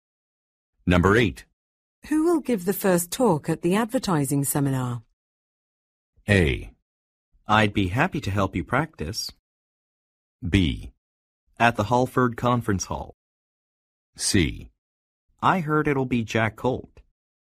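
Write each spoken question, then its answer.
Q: Who will give the first talk at the advertising seminar?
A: C: I heard it'll be Jack Colt.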